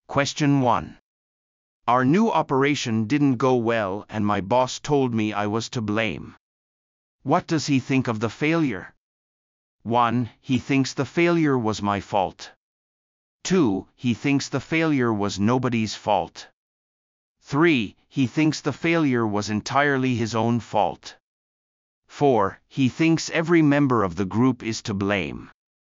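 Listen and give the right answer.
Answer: 1: He thinks the failure was my fault.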